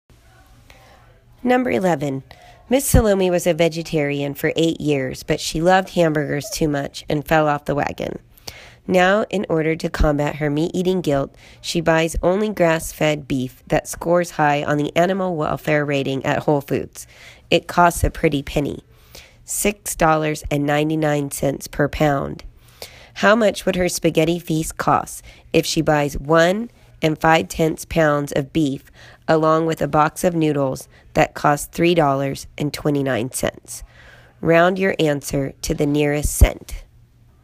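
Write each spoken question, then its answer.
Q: How much would her spaghetti feast cost if she buys 1 5/10 pounds of beef along with a box of noodles that cost $3.29? Round your answer to the nearest cent.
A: $13.78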